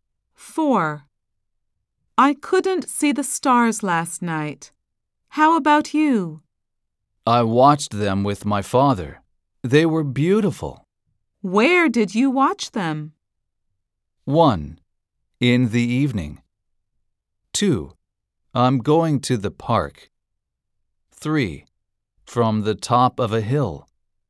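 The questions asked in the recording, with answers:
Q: Where did you watch them?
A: 3: From the top of a hill.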